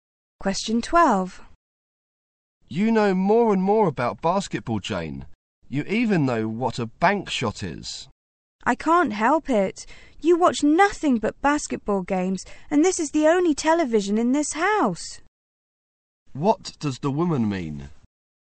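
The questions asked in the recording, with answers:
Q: What does the woman mean?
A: She learned about basketball because the man only watches basketball on the only TV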